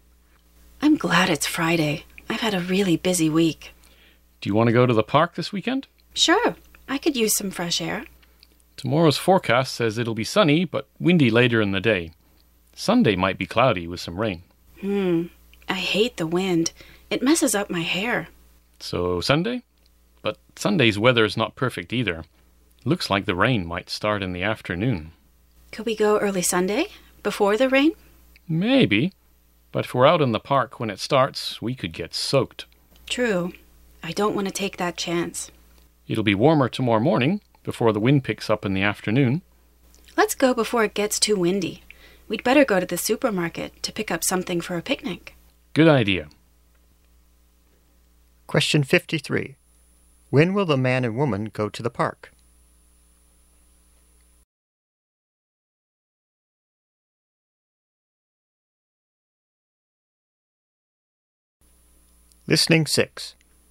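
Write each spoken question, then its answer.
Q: When will the man and woman go to the park?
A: Tomorrow (Saturday) morning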